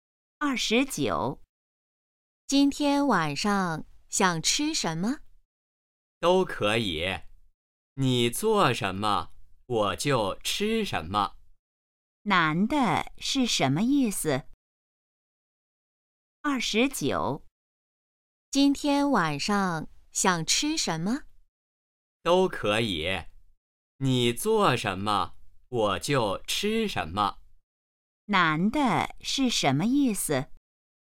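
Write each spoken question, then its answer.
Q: 男的是什么意思?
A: 吃什么都可以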